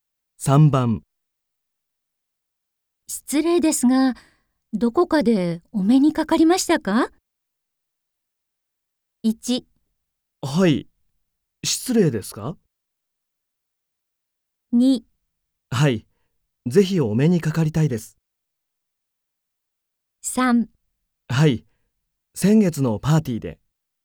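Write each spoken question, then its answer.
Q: 失礼ですが、どこかでお目にかかりましたか?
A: 3: はい、先月のパーティーで。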